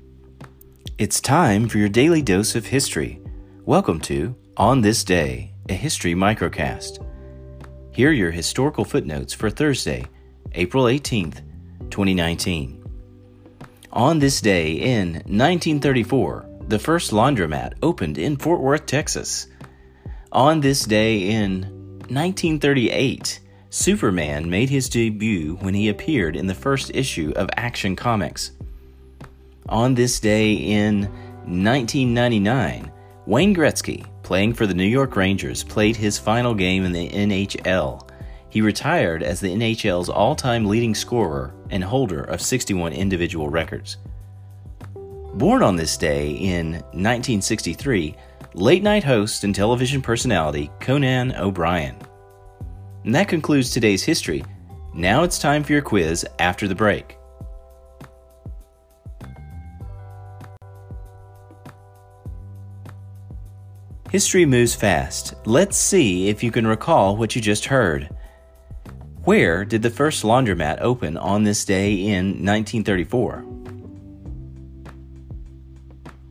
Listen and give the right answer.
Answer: Fort Worth, Texas.